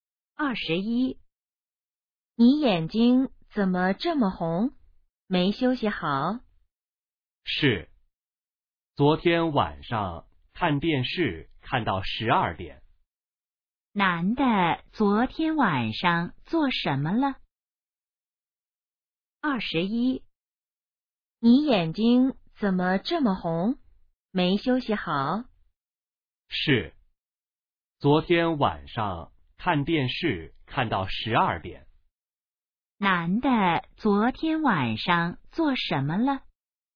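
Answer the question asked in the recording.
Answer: 看电视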